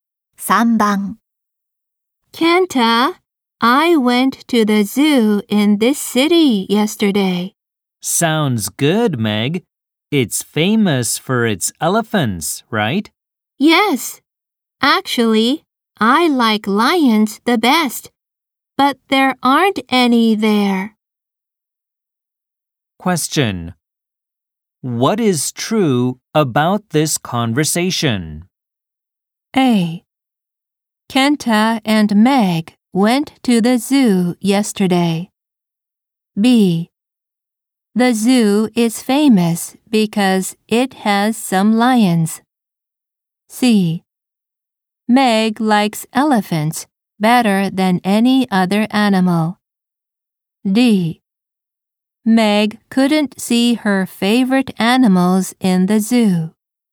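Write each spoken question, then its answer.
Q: What is true about this conversation?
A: D: Meg couldn't see her favorite animals in the zoo.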